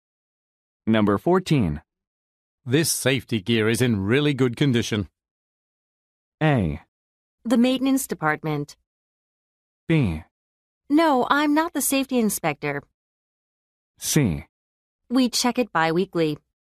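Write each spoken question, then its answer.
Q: This safety gear is in really good condition.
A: C: We check it bi-weekly.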